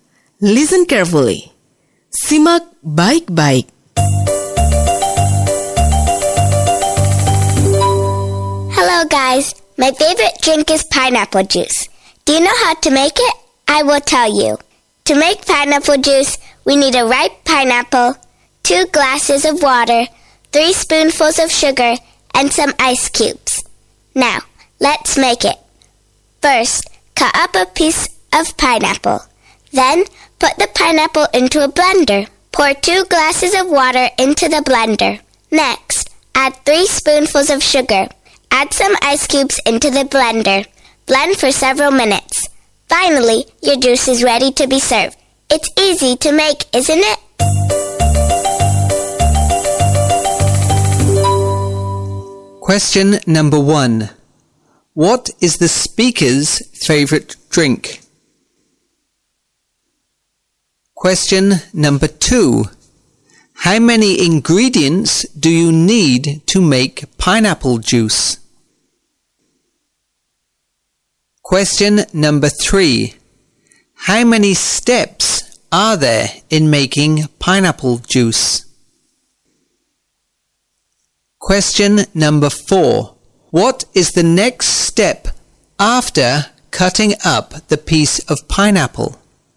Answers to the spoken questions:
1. pineapple juice.
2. 4 ingredients.
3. 6 steps.
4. Put the pineapple into a blender.